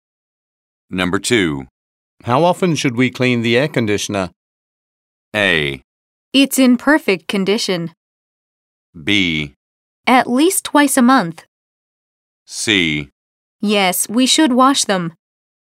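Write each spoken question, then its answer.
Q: How often should we clean the air conditioner?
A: B: At least twice a month.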